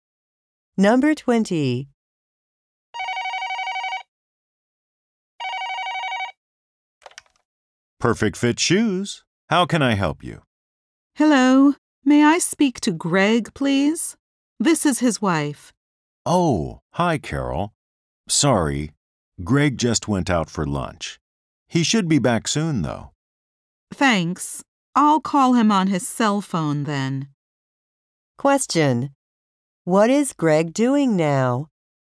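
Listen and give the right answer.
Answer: Having lunch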